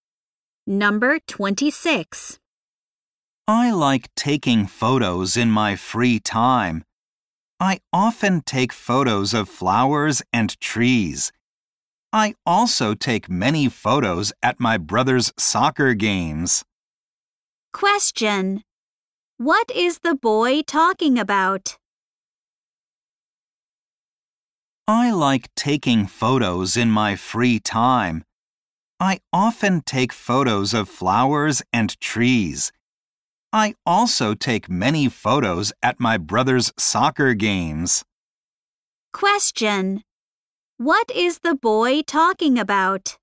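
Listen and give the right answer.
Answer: His hobby of taking photos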